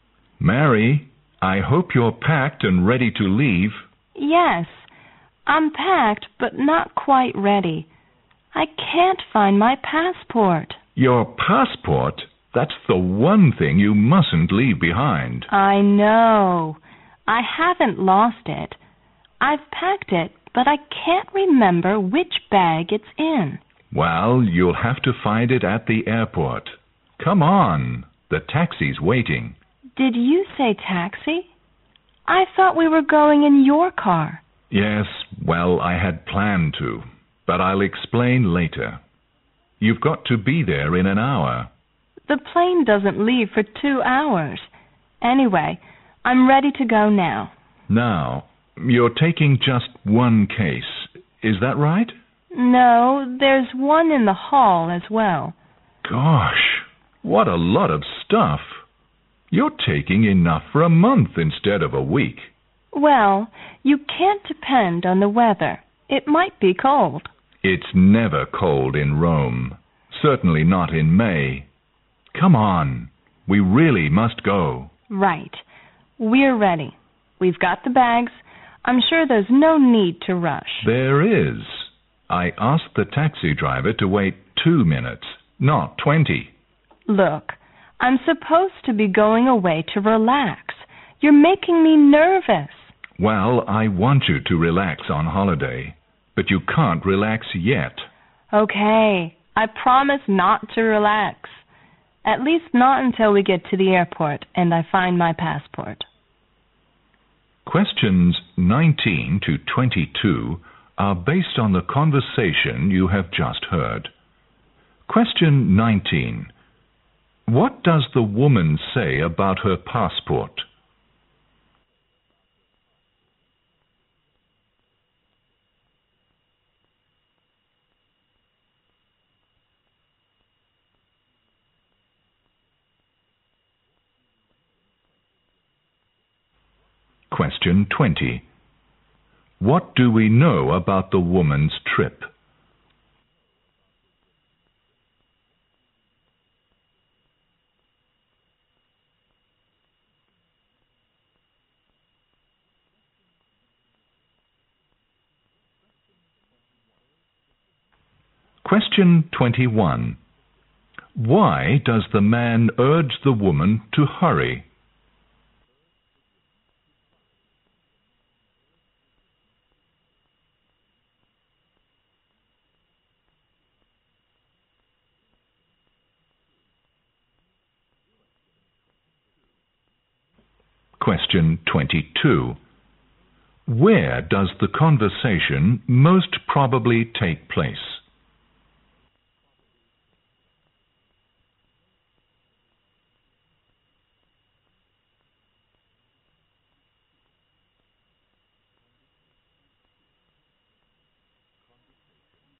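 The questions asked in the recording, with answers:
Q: What does the woman say about her passport?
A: She has packed it but can't remember which bag it's in.

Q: What do we know about the woman's trip?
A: She is going to Rome for a week's holiday, in May.

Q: Why does the man urge the woman to hurry?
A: The taxi is waiting.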